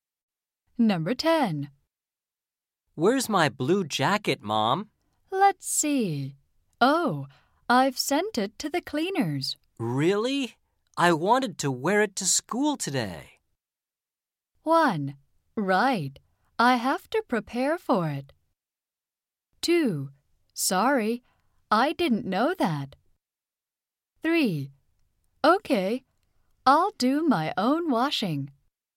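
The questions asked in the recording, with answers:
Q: Really? I wanted to wear it to school today.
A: 2: Sorry, I didn't know that.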